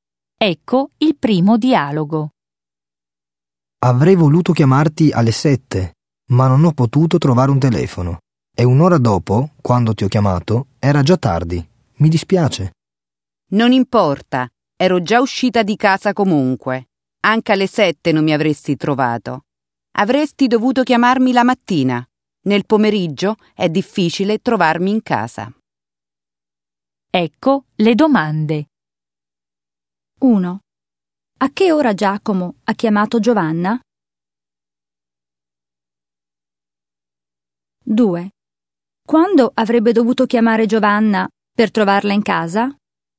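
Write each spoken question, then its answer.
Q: A che ora Giacomo ha chiamato Giovanna?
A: Alle 8

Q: Quando avrebbe dovuto chiamare Giovanna per trovarla in casa?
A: La mattina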